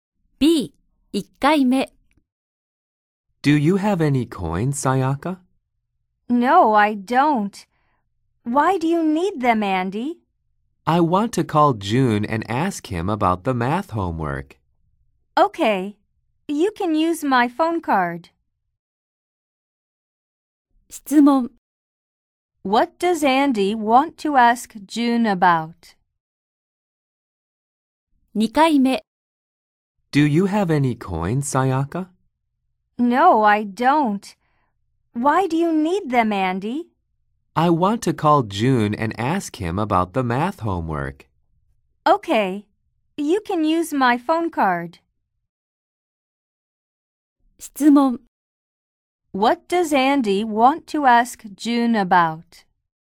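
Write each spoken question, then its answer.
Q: What does Andy want to ask June about?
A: The math homework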